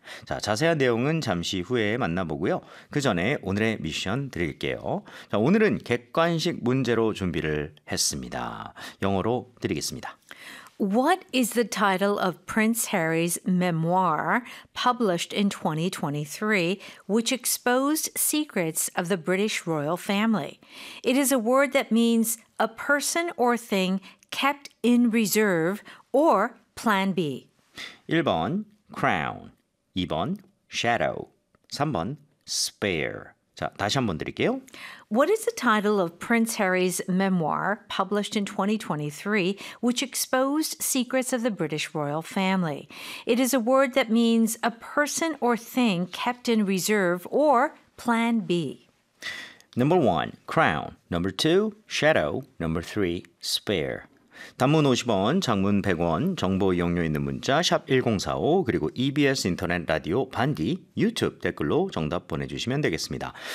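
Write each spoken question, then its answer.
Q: What is the title of Prince Harry's memoir published in 2023, which exposed secrets of the British royal family?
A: 3: spare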